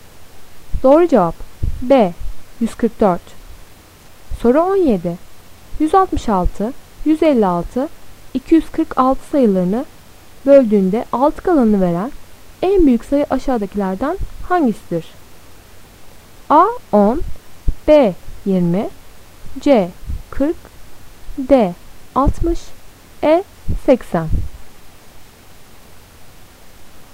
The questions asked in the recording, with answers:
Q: 166, 156, 246 sayılarını böldüğünde 6 kalanını veren en büyük sayı aşağıdakilerden hangisidir?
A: Doğru cevap A 10.